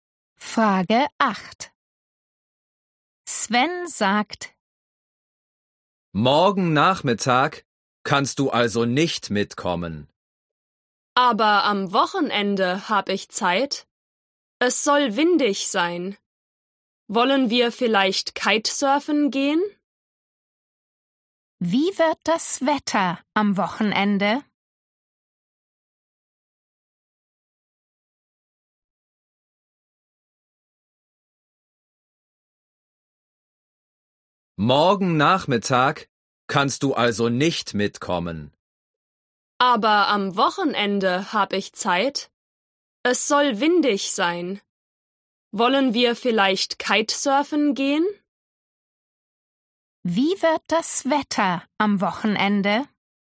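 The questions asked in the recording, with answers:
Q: Wie wird das Wetter am Wochenende?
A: windig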